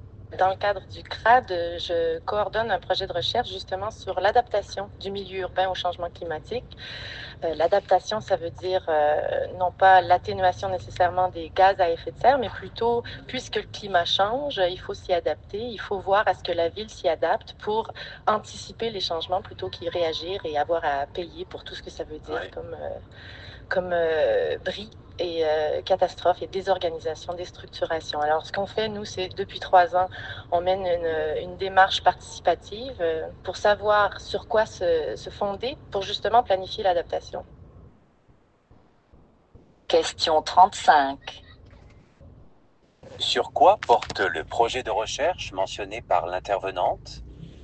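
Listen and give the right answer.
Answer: Sur l'adaptation du milieu urbain au changement climatique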